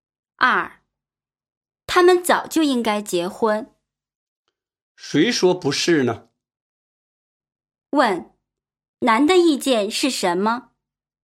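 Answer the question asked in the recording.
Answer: 同意他们早就应该结婚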